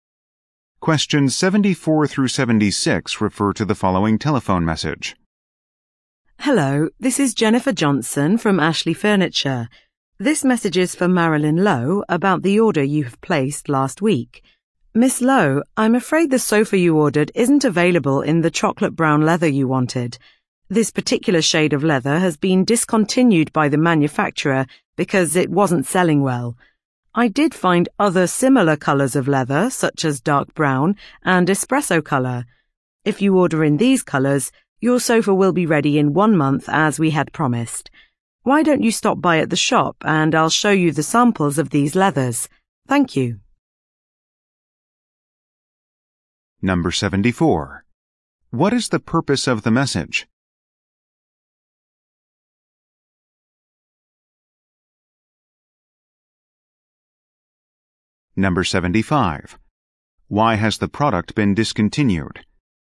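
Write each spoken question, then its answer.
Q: What is the purpose of the message?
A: To tell the customer that the sofa isn't available in the chocolate brown leather she ordered

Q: Why has the product been discontinued?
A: It wasn't selling well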